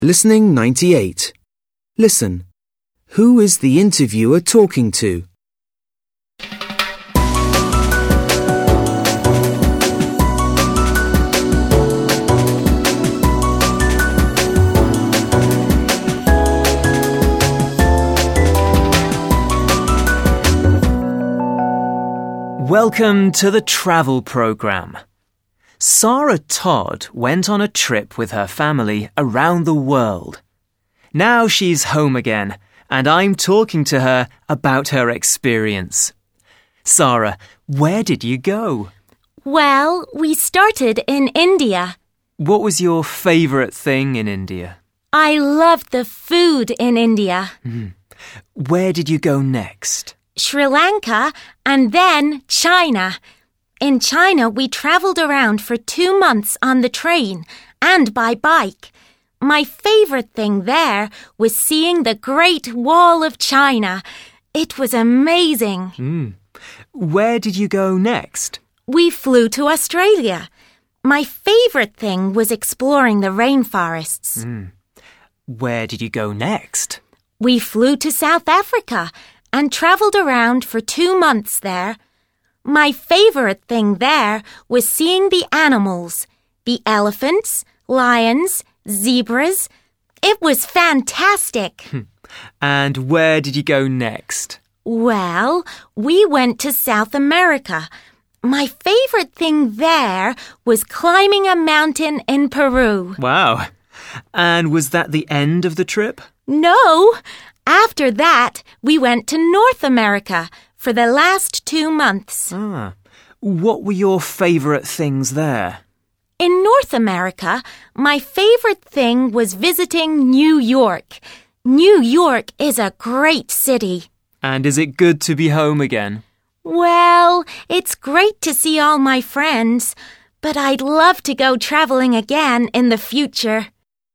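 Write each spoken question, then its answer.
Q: Who is the interviewer talking to?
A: Sarah Todd, who went on a trip around the world with her family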